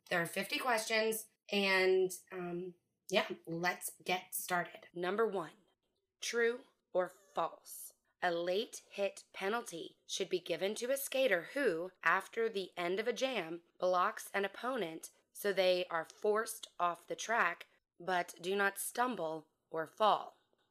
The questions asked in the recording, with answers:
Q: A late hit penalty should be given to a skater who, after the end of a jam, blocks an opponent so they are forced off the track but do not stumble or fall.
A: The answer is false.